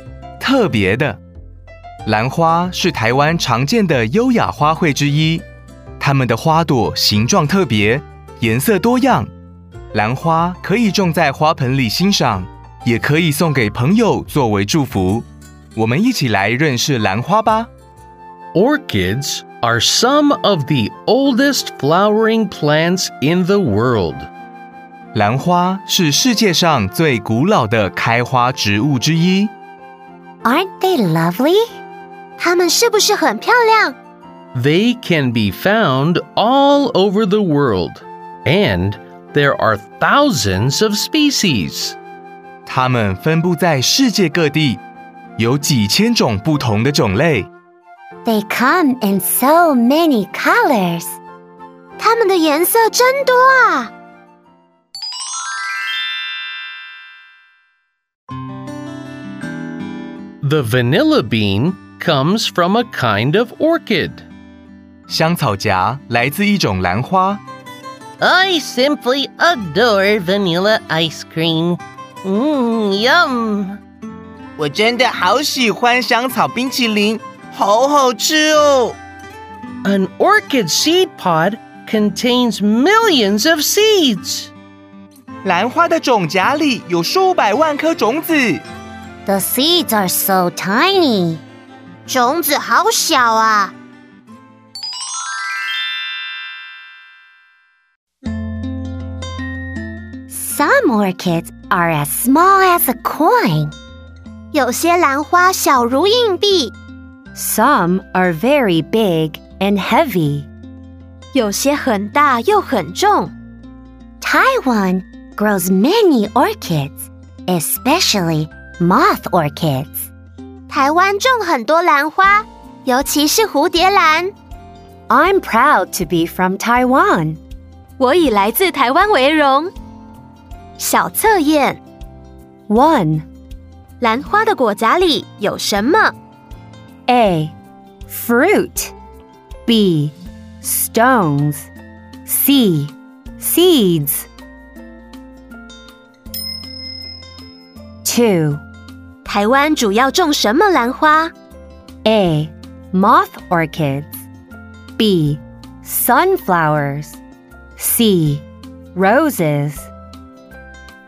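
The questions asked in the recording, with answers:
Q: 兰花的果荚里有什么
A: C: Seeds

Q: 台湾主要种什么兰花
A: A: Moth orchids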